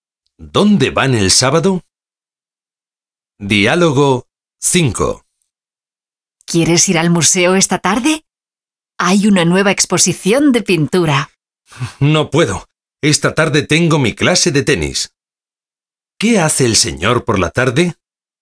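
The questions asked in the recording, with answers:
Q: ¿Qué hace el señor por la tarde?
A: Tiene clase de tenis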